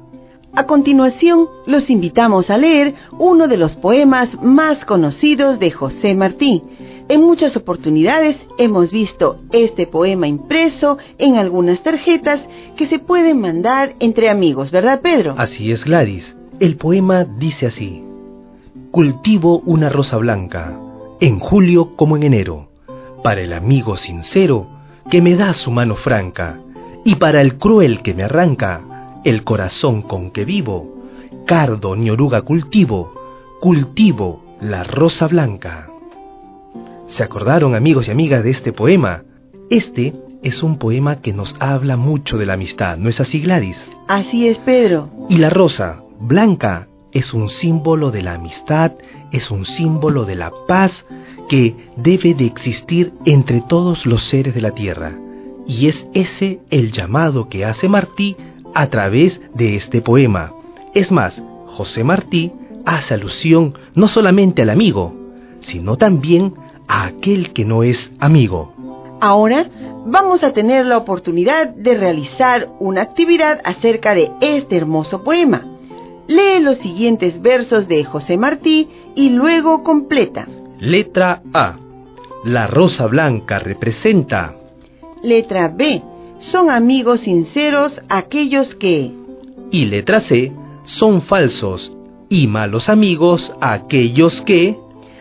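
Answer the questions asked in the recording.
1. la amistad y la paz
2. nos dan su mano franca
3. nos arrancan el corazón con que vivimos (los crueles)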